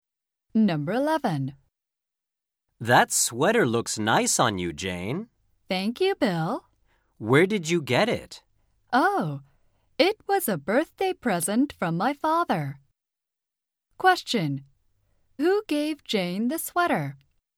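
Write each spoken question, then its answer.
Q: Who gave Jane the sweater?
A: Her father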